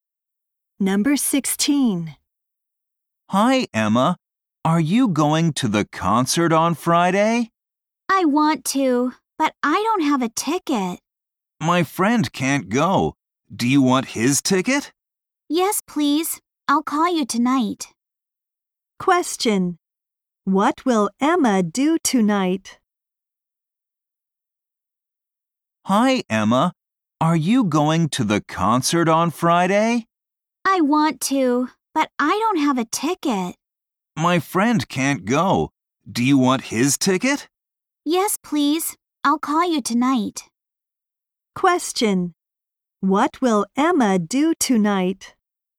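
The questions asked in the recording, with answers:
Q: What will Emma do tonight?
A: Call the boy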